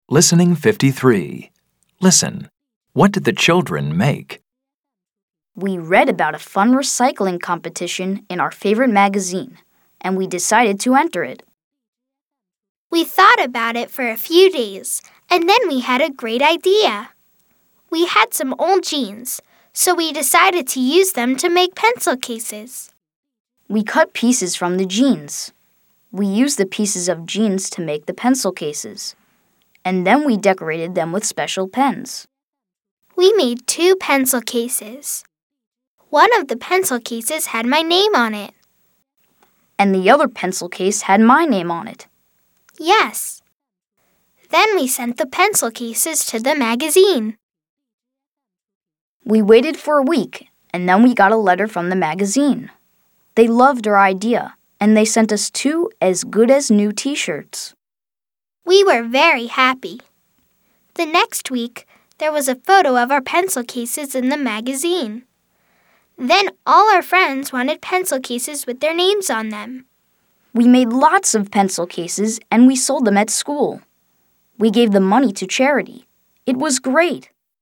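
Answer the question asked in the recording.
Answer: Pencil cases (from old jeans)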